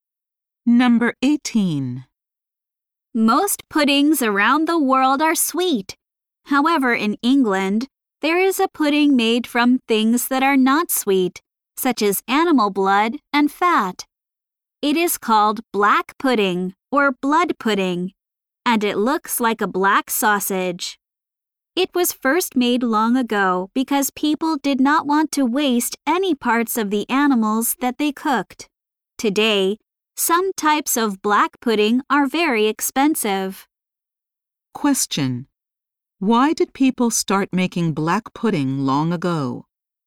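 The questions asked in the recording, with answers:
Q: Why did people start making black pudding long ago?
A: They did not want to waste any parts of the animals.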